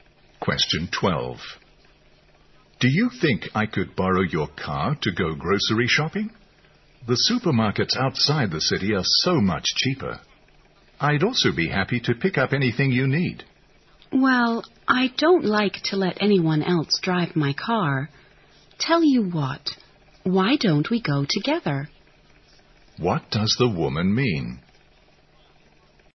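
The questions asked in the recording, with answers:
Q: What does the woman mean?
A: She won't lend her car, but she suggests they go shopping together.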